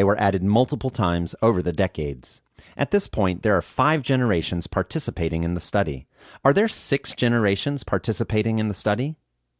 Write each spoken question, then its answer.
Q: Are there 6 generations participating in the study?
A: No, there are not 6 generations participating in the study.